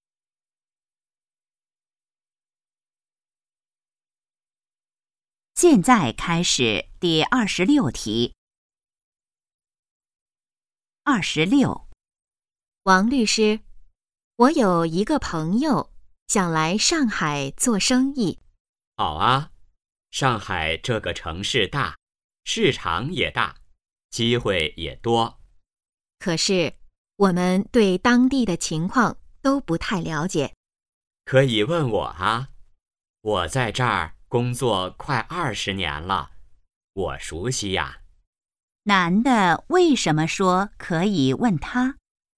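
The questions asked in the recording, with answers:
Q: 男的为什么说可以问他?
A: 他熟悉当地情况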